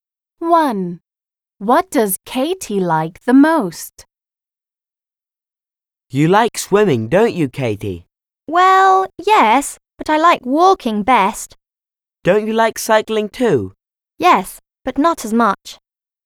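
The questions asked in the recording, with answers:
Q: What does Katie like the most?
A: walking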